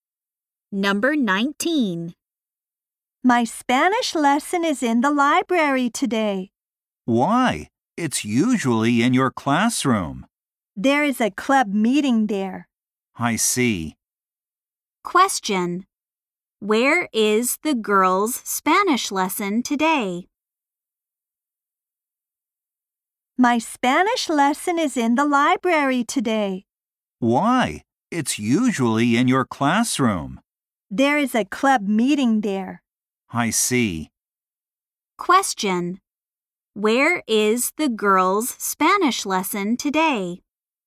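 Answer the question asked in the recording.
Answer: In the library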